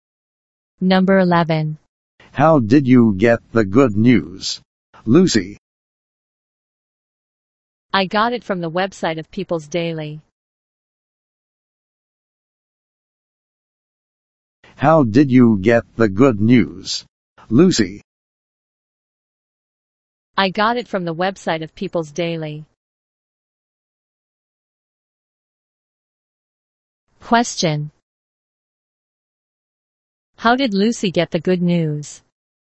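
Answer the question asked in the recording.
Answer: From the website of People's Daily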